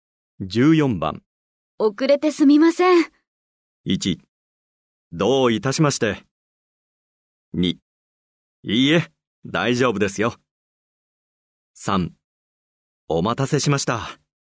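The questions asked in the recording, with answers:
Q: 遅れてすみません。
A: 2: いいえ、大丈夫ですよ。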